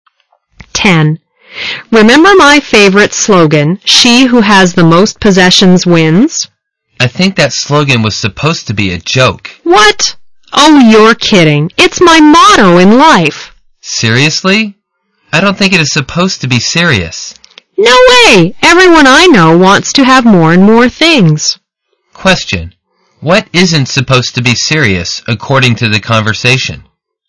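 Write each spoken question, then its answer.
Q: What isn't supposed to be serious, according to the conversation?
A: The slogan "She who has the most possessions wins"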